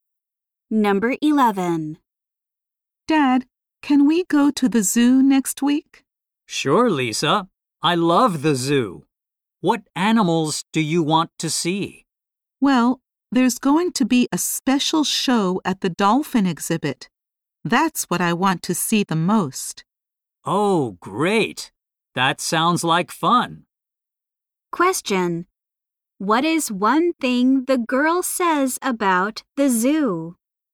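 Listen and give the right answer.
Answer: She most wants to see the special dolphin show there.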